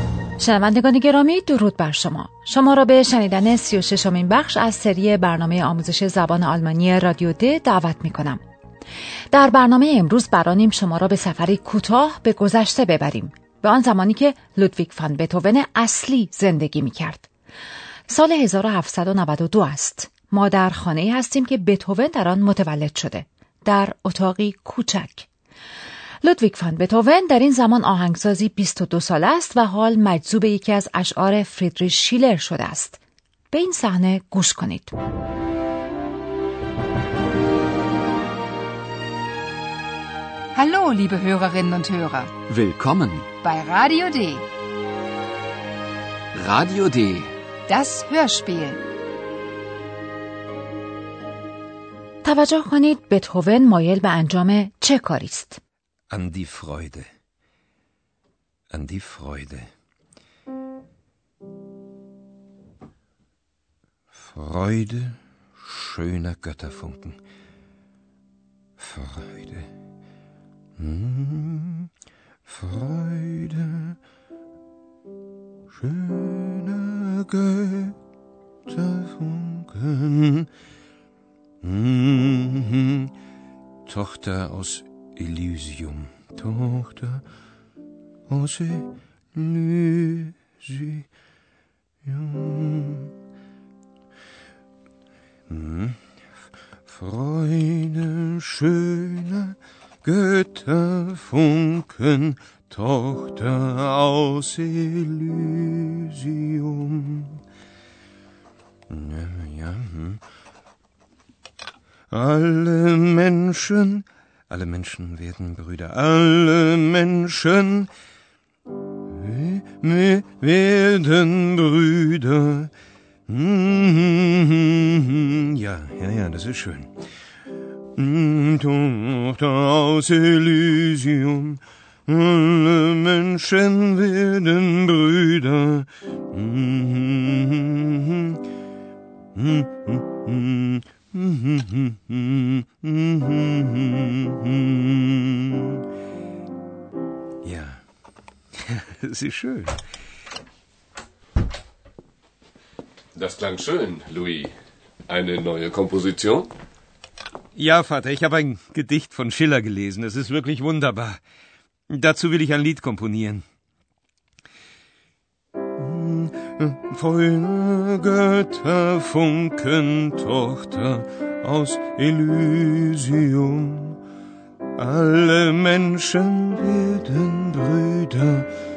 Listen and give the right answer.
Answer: او بران است که آهنگی برای یک لید یعنی ترانه‌ای بسازد.